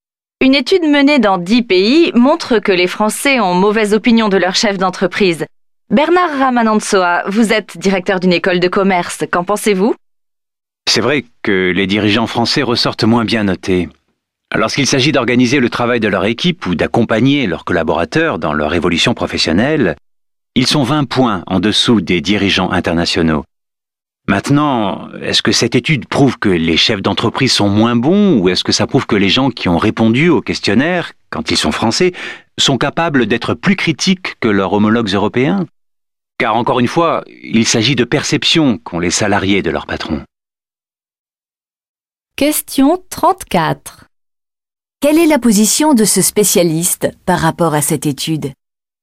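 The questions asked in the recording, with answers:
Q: Quelle est la position de ce spécialiste par rapport à cette étude ?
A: Il la relativise : elle montre peut-être surtout que les salariés français sont plus critiques envers leur patron, car il s'agit de perceptions.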